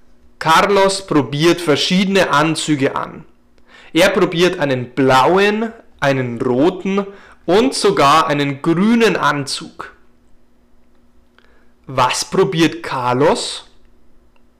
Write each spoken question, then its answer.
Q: Was probiert Carlos?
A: Verschiedene Anzüge. Carlos probiert verschiedene Anzüge an.